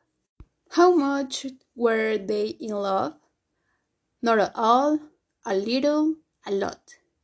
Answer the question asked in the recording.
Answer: A lot. They were absolutely in love.